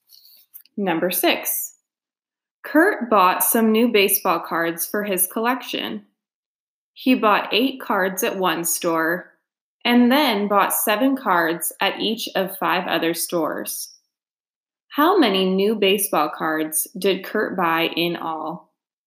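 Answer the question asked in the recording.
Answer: 43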